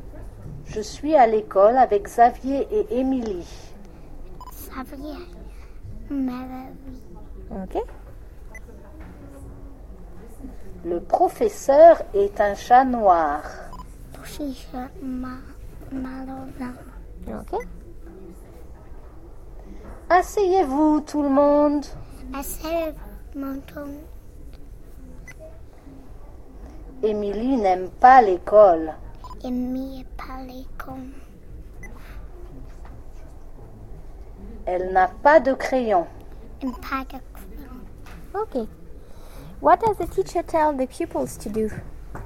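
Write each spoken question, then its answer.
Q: What does the teacher tell the pupils to do?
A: Sit down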